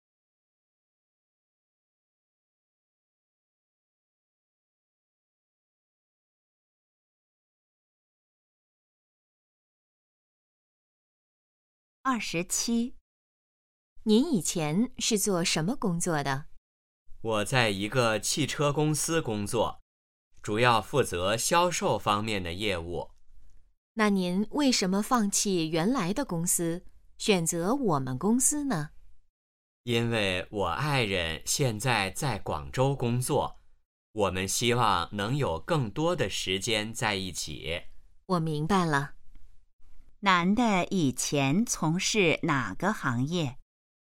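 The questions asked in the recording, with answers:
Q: 男的以前从事哪个行业?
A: 汽车销售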